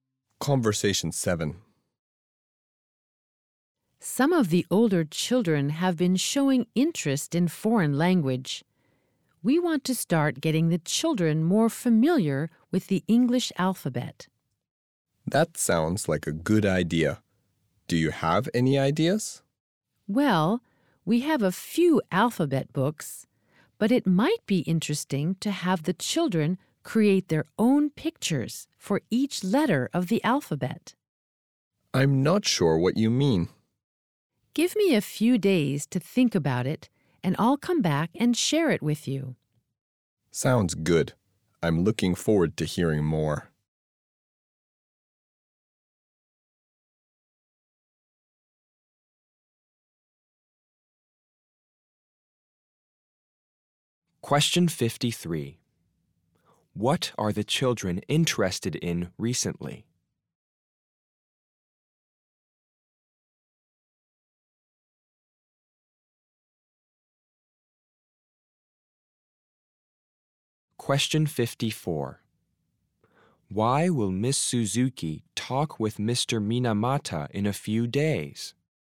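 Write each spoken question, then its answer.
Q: What are the children interested in recently?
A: Foreign language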